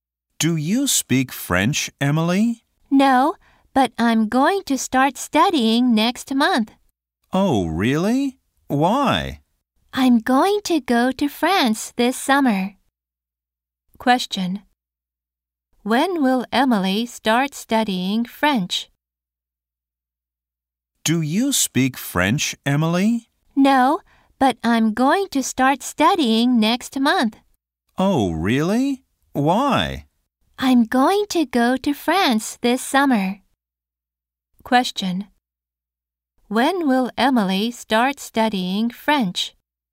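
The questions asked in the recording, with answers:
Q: When will Emily start studying French?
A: Next month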